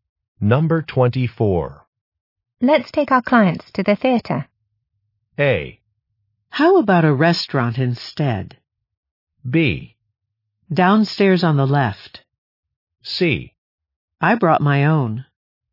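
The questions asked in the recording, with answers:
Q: Let's take our clients to the theater.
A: A: How about a restaurant instead?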